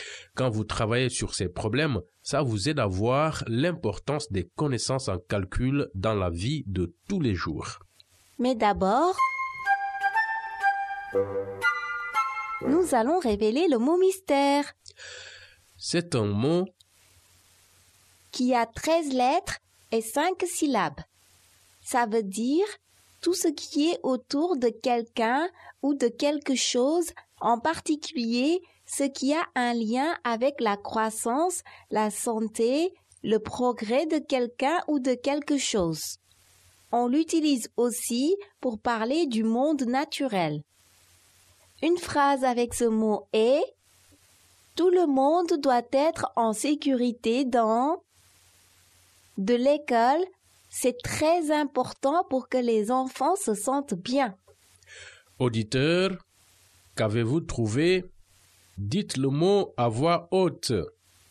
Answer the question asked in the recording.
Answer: Le mot mystère est environnement.